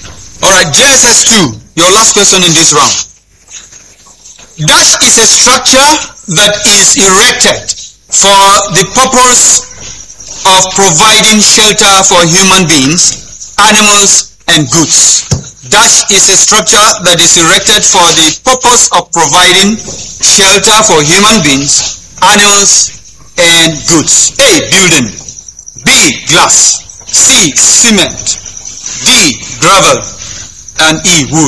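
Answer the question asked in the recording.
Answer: A: Building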